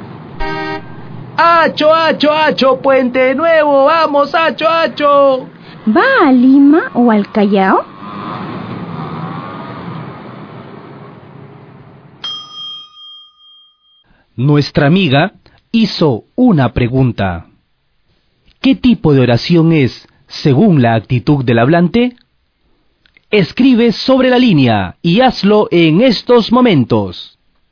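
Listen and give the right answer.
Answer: Oración interrogativa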